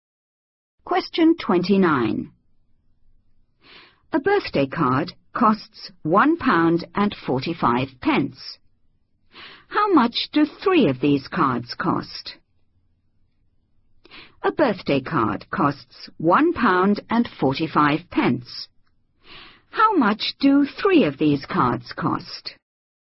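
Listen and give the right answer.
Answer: £4.35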